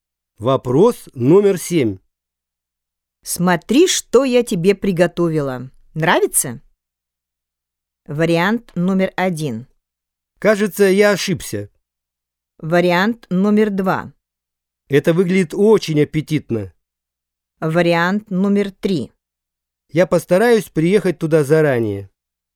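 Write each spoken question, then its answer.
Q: Смотри, что я тебе приготовила. Нравится?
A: 2: Это выглядит очень аппетитно.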